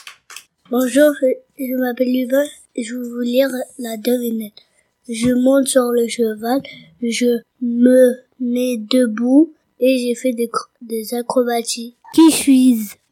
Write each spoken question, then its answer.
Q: Qui suis-je?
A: Un écuyer.